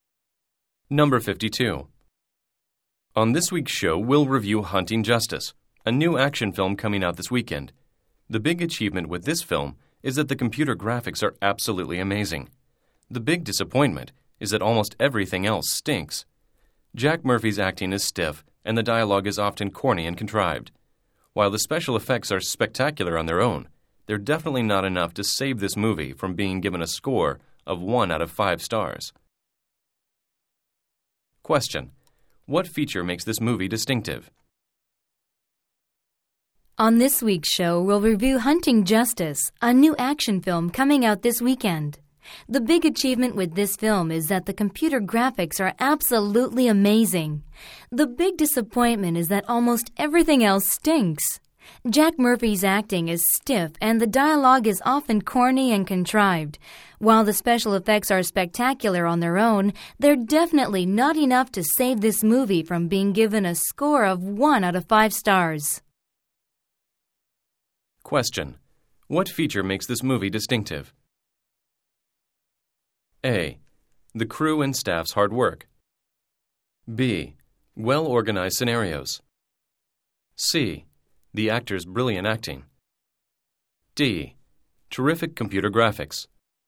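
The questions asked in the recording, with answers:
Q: What feature makes this movie distinctive?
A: D: Terrific computer graphics.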